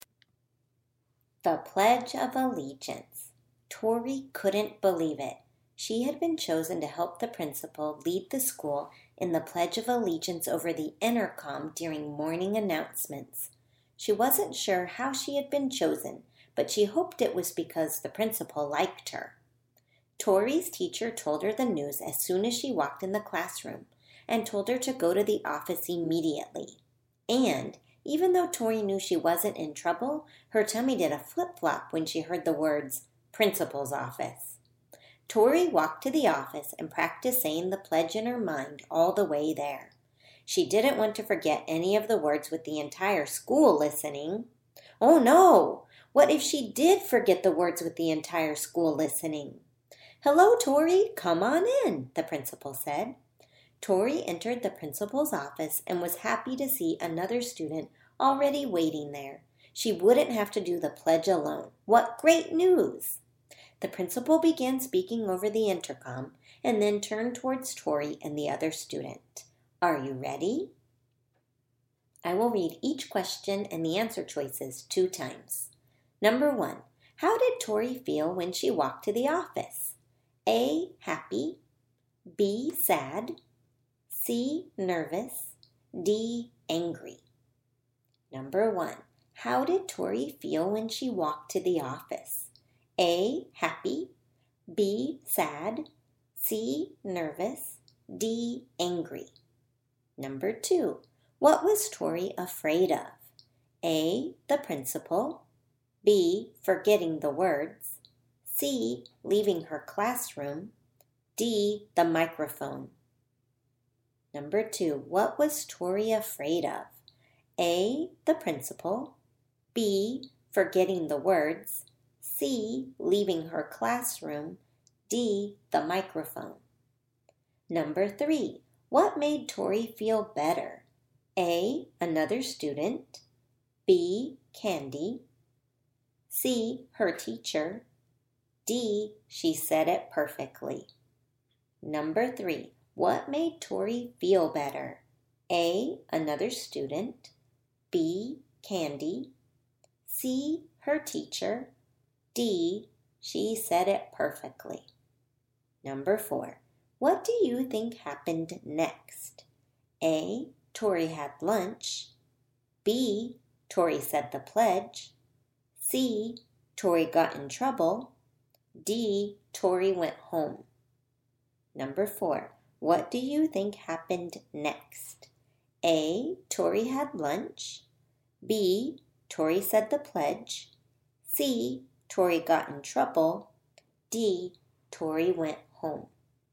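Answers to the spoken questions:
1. C: nervous
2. B: forgetting the words
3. A: another student
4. B: Tori said the pledge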